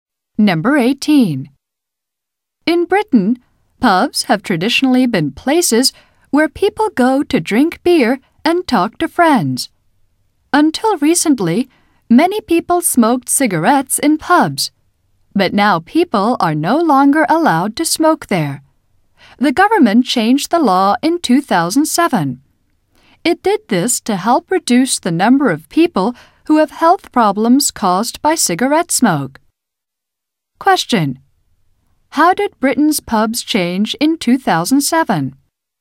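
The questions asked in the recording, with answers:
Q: How did Britain's pubs change in 2007?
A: People were no longer allowed to smoke in them.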